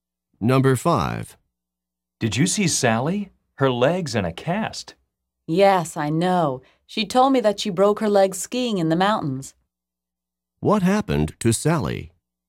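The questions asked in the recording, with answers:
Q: What happened to Sally?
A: She broke her leg skiing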